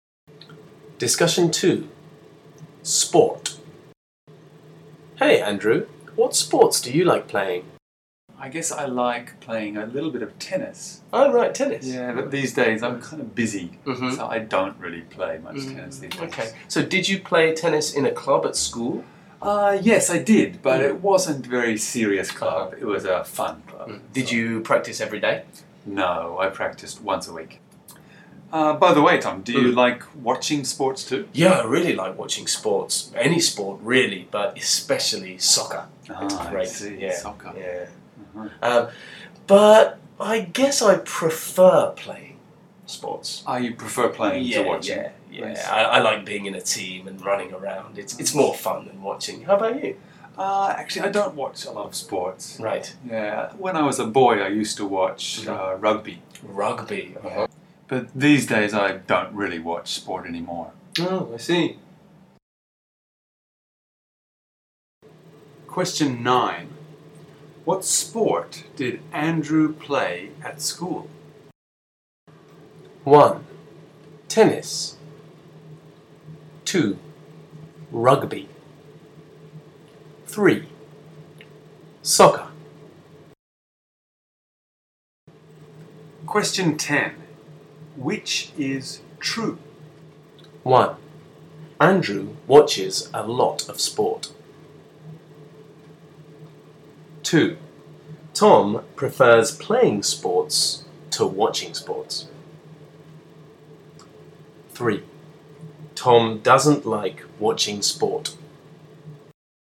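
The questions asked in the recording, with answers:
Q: What sport did Andrew play at school?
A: 1: Tennis

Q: Which is true?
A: 2: Tom prefers playing sports to watching sports.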